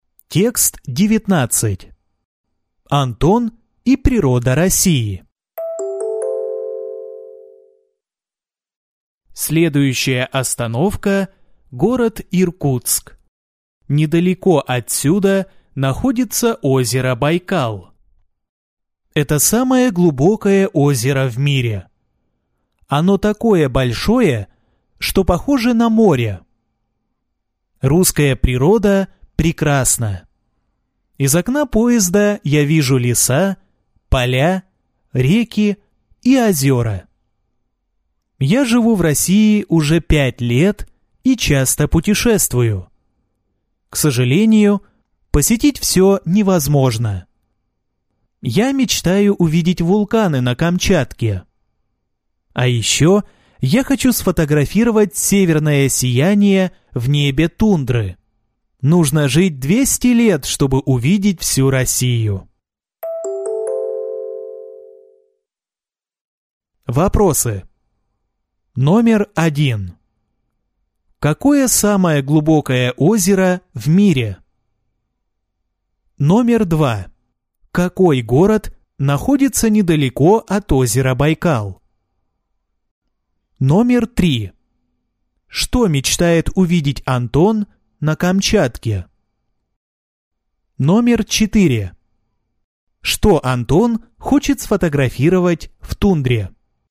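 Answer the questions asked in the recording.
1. Байкал
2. Иркутск
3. Вулканы
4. Северное сияние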